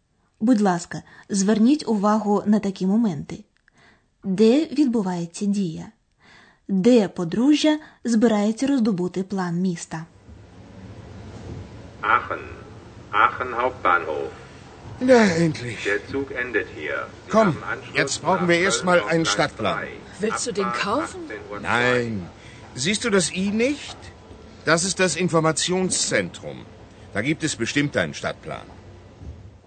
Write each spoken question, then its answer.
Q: Де відбувається дія?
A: Як ви, певно, зрозуміли з оголошення, дія відбувається на центральному вокзалі Ахена.

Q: Де подружжя збирається роздобути план міста?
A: Там, як і у більшості великих міст, є бюро довідок.